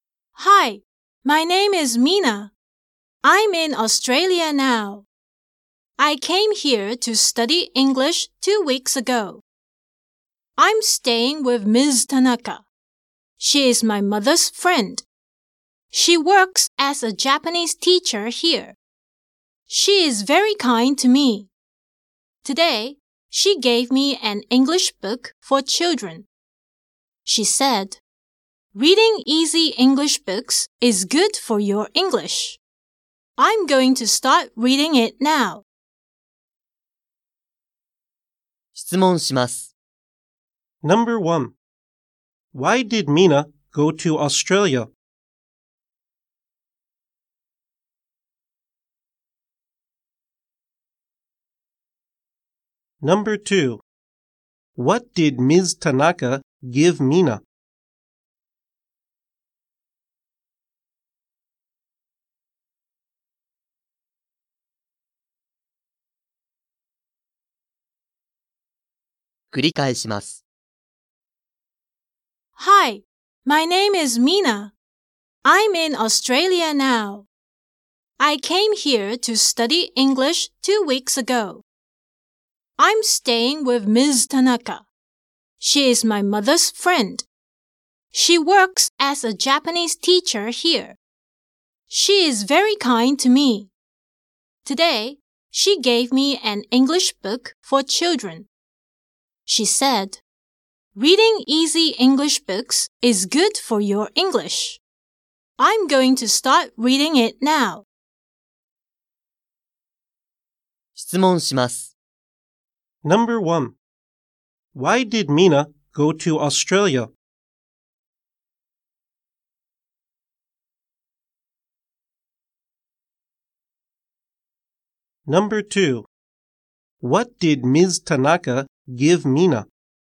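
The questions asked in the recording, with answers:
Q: Why did Mina go to Australia?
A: To study English.

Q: What did Ms. Tanaka give Mina?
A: An English book for children.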